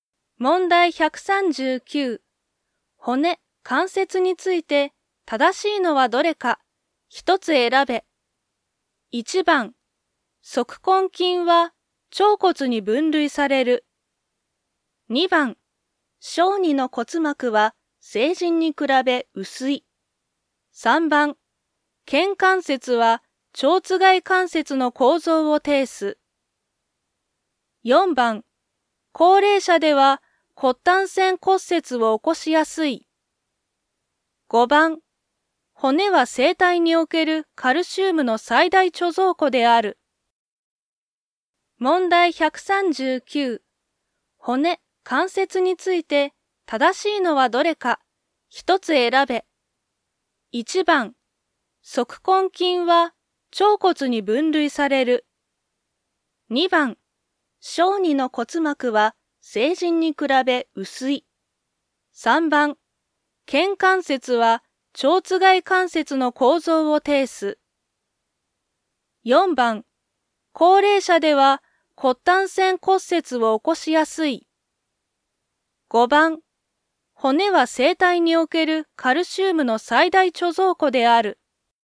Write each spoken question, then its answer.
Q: 骨、関節について正しいのはどれか、一つ選べ。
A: 5番、骨は生体におけるカルシウムの最大貯蔵庫である。